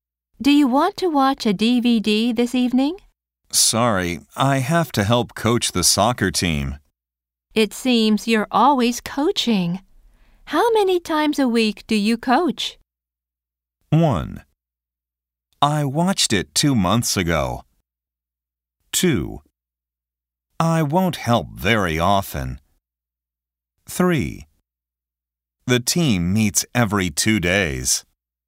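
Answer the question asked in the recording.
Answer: 3: The team meets every 2 days.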